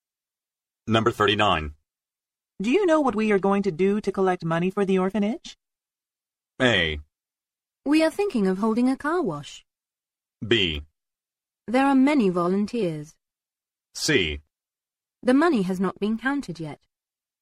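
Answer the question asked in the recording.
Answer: A: We are thinking of holding a car wash.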